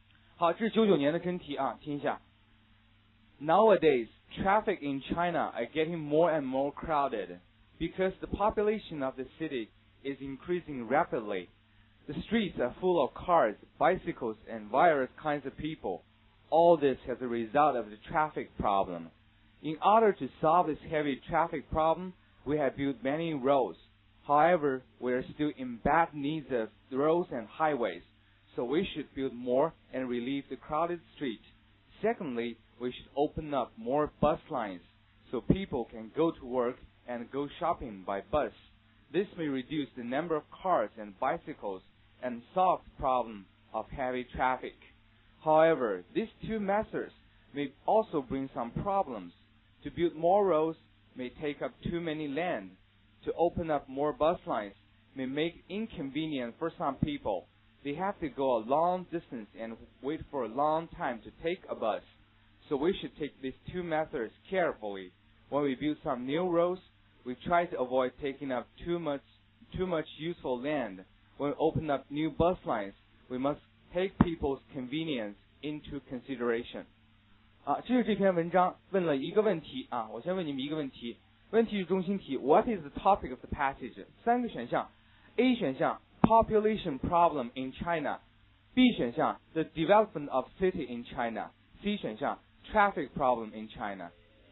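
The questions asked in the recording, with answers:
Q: What is the topic of the passage?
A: C: Traffic problem in China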